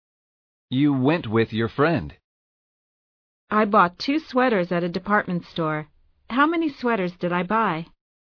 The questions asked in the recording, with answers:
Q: How many sweaters did I buy?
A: You bought 2 sweaters.